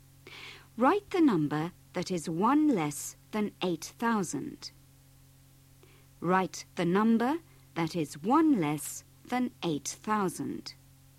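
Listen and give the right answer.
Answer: 7999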